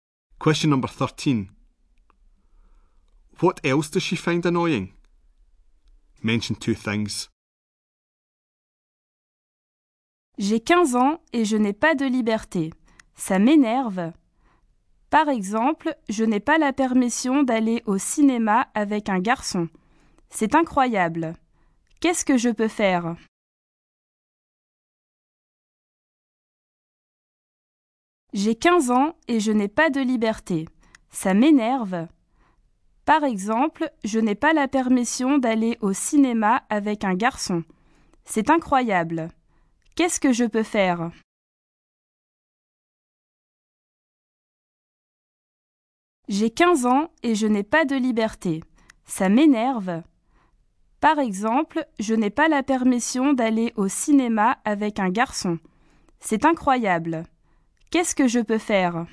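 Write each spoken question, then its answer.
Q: What else does she find annoying?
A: She is 15 and has no freedom; she is not allowed to go to the cinema with a boy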